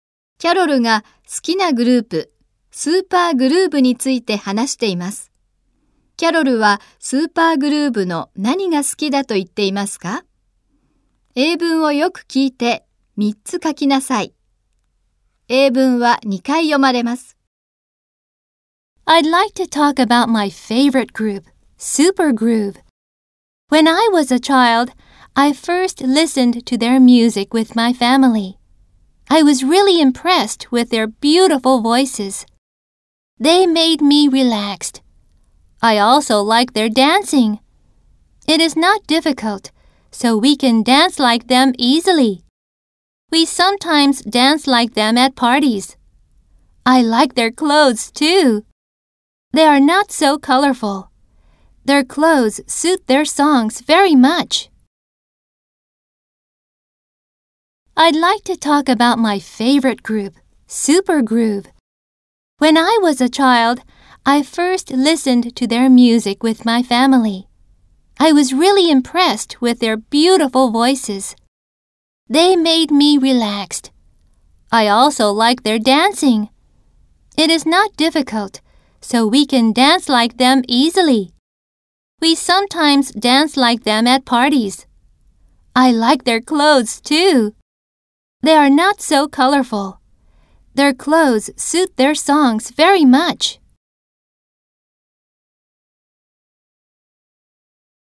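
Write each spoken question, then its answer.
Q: キャロルはスーパーグルーヴの何が好きだと言っていますか?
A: 声(美しい声)、ダンス、服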